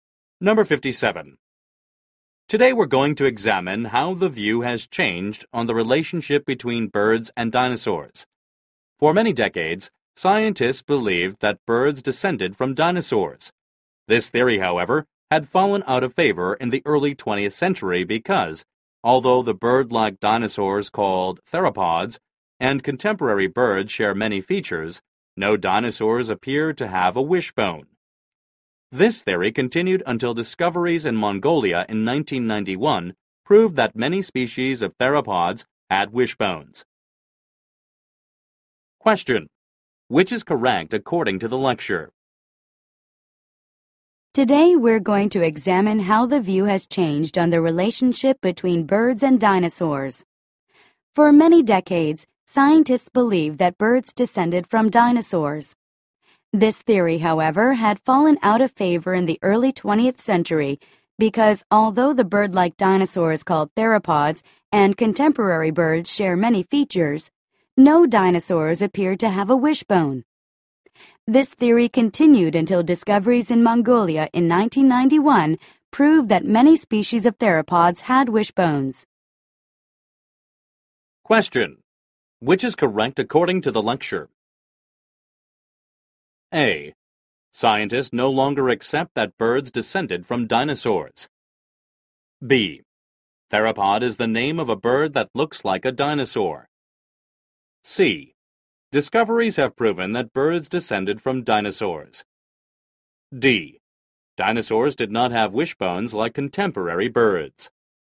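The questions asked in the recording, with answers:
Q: Which is correct according to the lecture?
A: C: Discoveries have proven that birds descended from dinosaurs.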